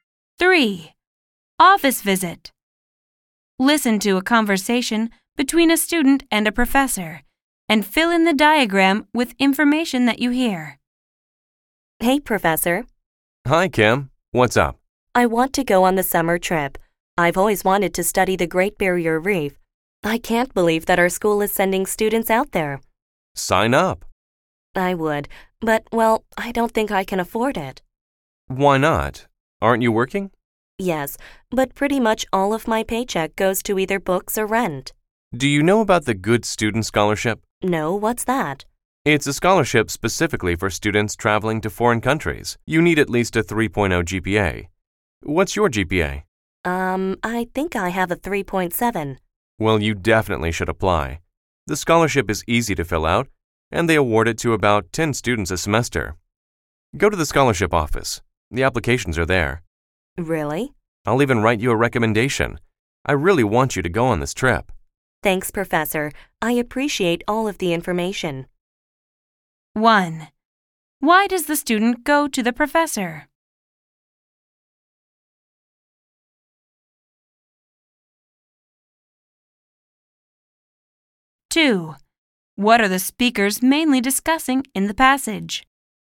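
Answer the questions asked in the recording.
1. She wants to go on the summer trip but can't afford it
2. A scholarship to pay for the summer trip to the Great Barrier Reef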